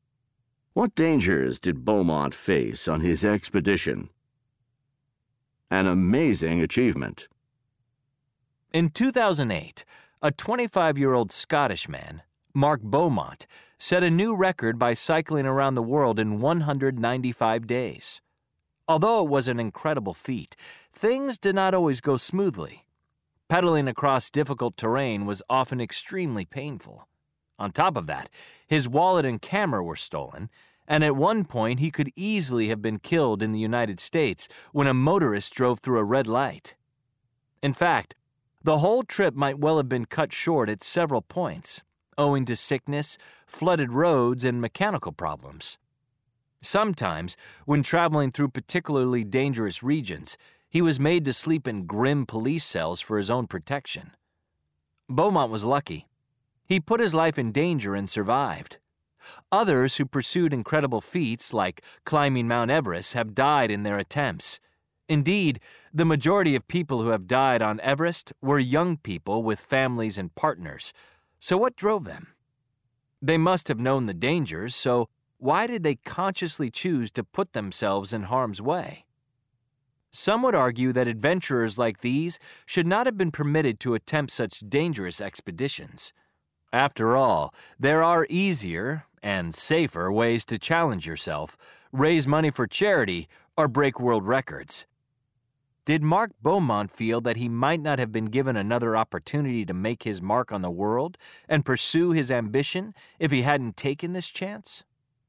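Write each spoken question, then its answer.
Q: What dangers did Beaumont face on his expedition?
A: Painful terrain, theft of his wallet and camera, nearly being killed by a motorist, sickness, flooded roads, mechanical problems, and dangerous regions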